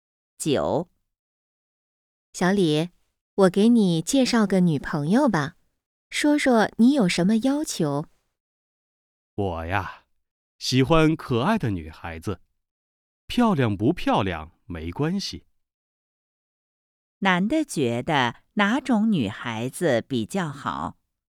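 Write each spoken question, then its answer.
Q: 男的觉得哪种女孩子比较好?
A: 可爱的女孩子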